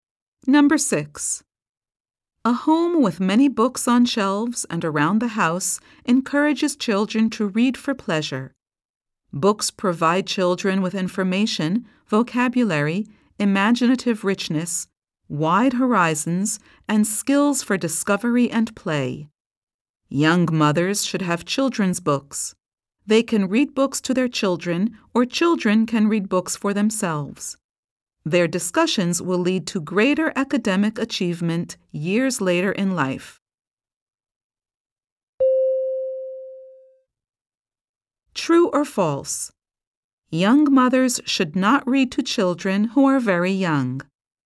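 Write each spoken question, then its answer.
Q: True or false? Young mothers should not read to children who are very young.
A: False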